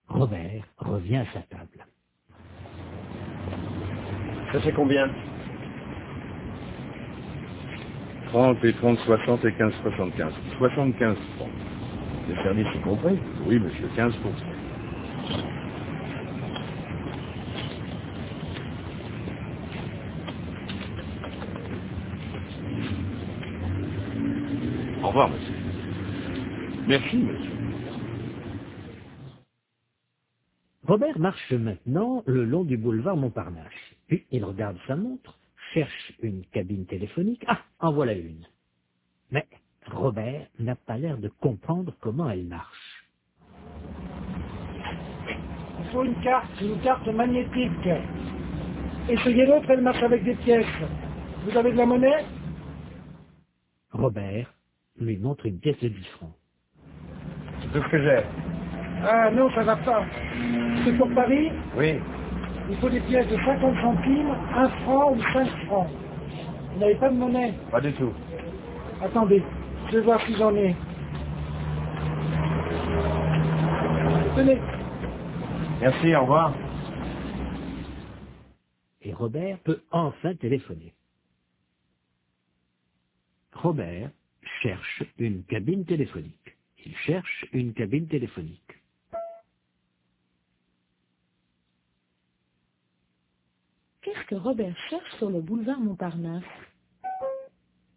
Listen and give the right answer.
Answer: Une cabine téléphonique.